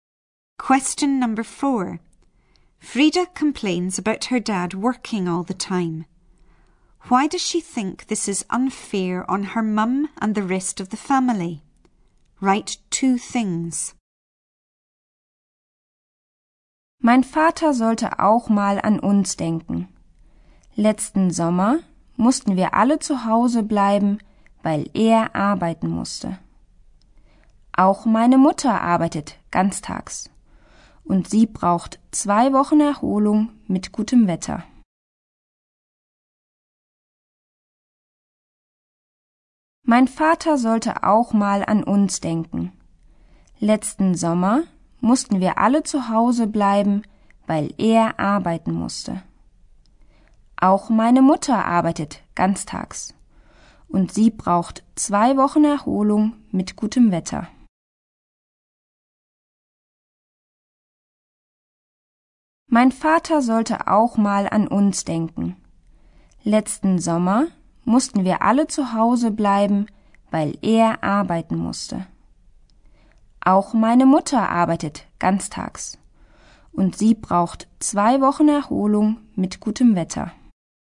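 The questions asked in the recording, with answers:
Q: Why does she think this is unfair on her mum and the rest of the family?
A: Last summer they all had to stay at home because he had to work; her mum also works full-time and needs two weeks' rest in good weather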